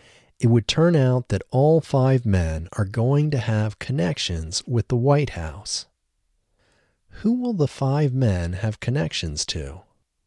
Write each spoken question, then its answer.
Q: Who will the five men have connections to?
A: The five men will have connections to the White House.